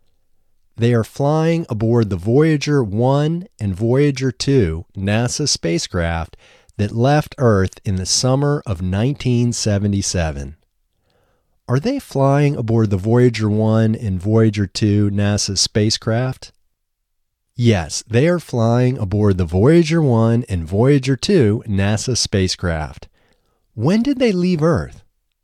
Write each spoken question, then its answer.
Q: When did they leave Earth?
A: They left Earth in the summer of 1977.